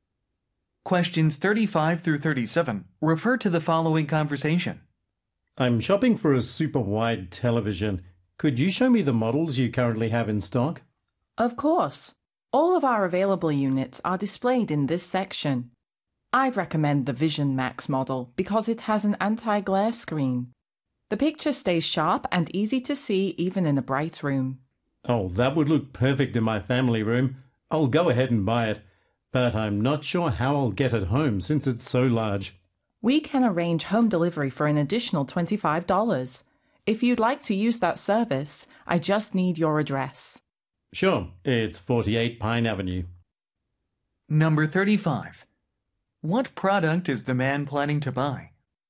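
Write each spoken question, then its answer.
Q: What product is the man planning to buy?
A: A super wide television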